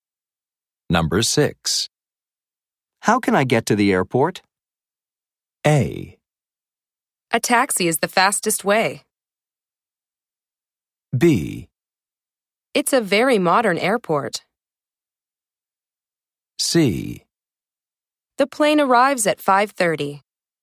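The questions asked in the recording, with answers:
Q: How can I get to the airport?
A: A: A taxi is the fastest way.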